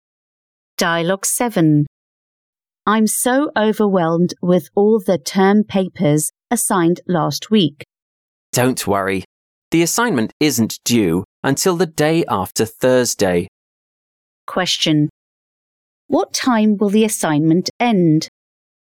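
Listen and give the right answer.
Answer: Friday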